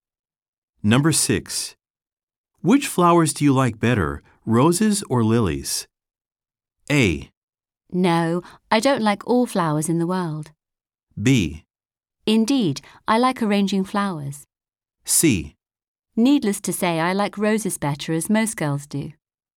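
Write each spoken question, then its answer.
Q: Which flowers do you like better, roses or lilies?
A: C: Needless to say, I like roses better, as most girls do.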